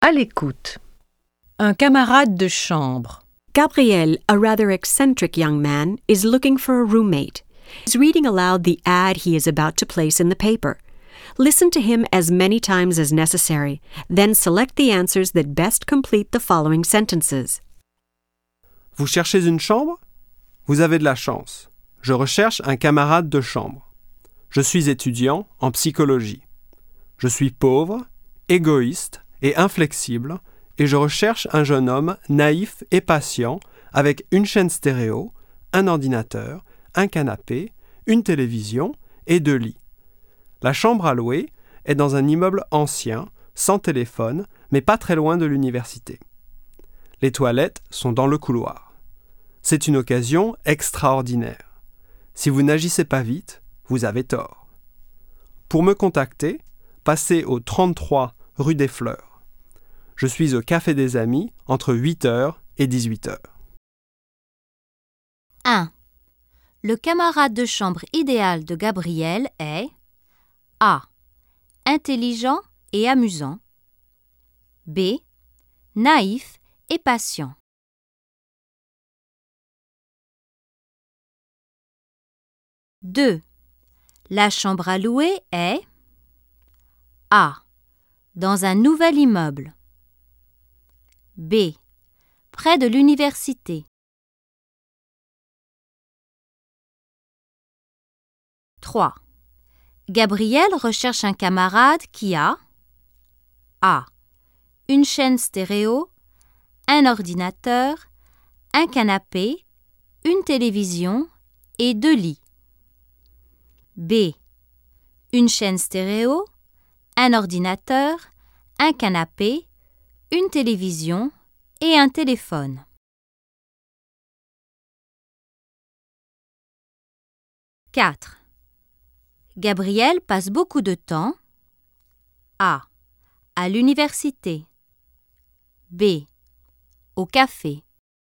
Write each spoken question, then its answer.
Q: Le camarade de chambre idéal de Gabriel est...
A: 1. B.

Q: La chambre à louer est...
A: 2. B.

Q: Gabriel recherche un camarade qui a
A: 3. A.

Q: Gabriel passe beaucoup de temps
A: 4. B.